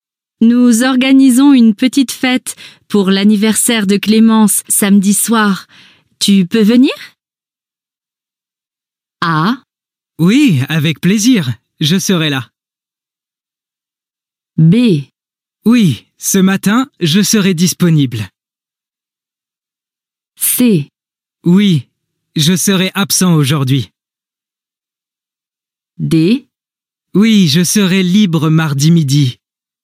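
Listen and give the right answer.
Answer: A: Oui, avec plaisir. Je serai là.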